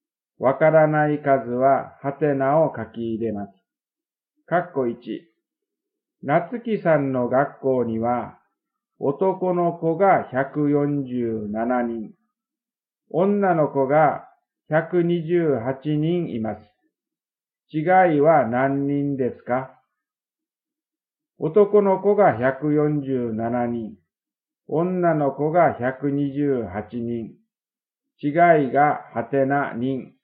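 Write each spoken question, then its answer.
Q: 違いは何人ですか?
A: 19人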